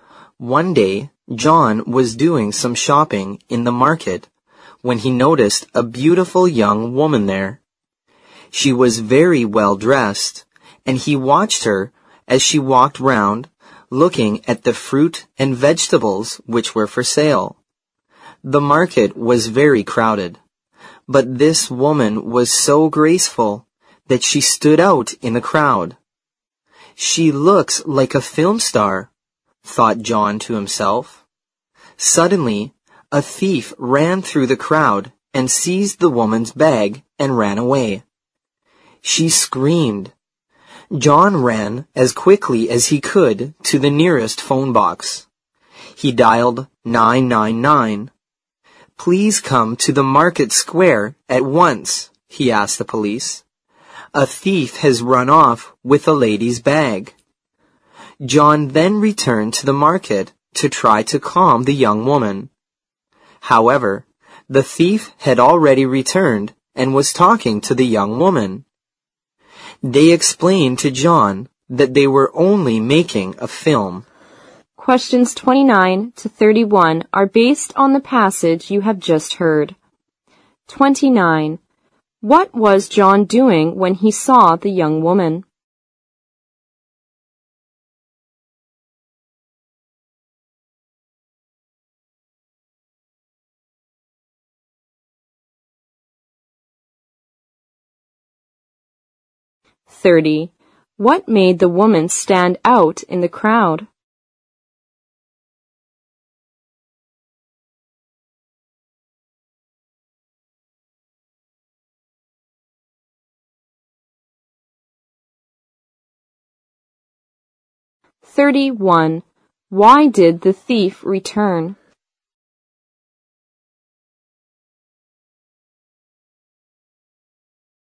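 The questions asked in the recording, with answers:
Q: What was John doing when he saw the young woman?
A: Shopping in the market

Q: What made the woman stand out in the crowd?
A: She was so graceful

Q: Why did the thief return?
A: They were only making a film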